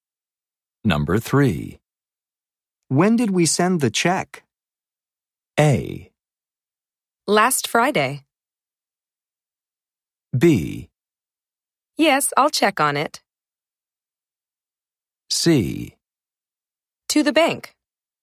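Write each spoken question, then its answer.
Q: When did we send the check?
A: A: Last Friday.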